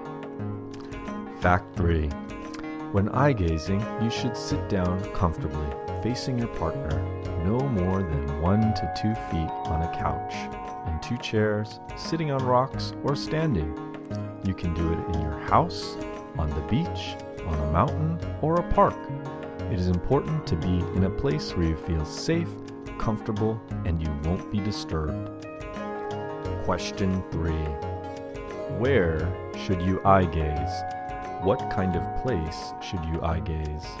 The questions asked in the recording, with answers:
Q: Where should you eye gaze?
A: You can do it in your house, on the beach, on a mountain, or a park.

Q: What kind of place should you eye gaze?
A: It is important to be in a place where you feel safe, comfortable, and you won't be disturbed.